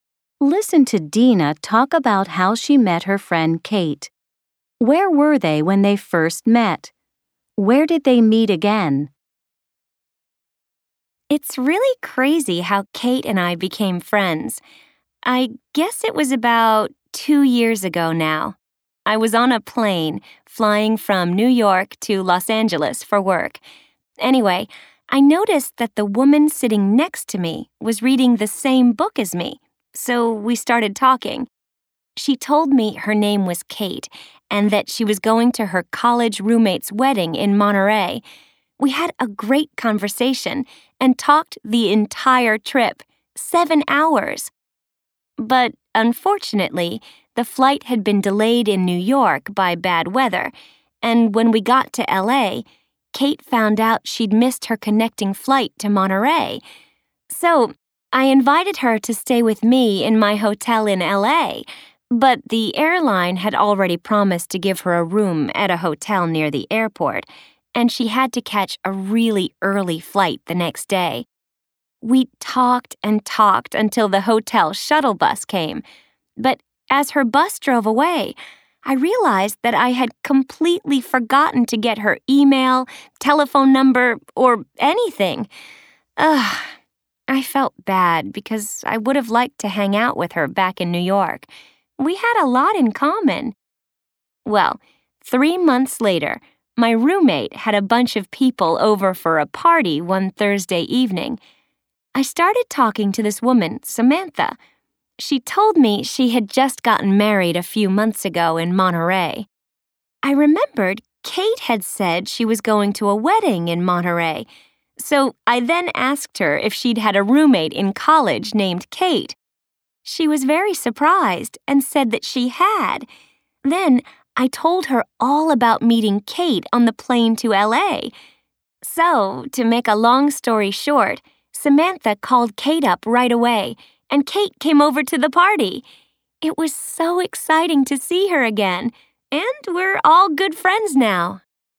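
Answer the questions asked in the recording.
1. On a plane from New York to Los Angeles
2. At a party at Dina's place, thrown by her roommate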